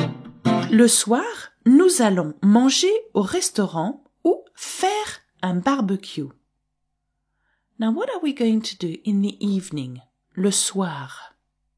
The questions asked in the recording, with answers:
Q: Now, what are we going to do in the evening, le soir?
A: Nous allons manger, we are going to eat, au restaurant.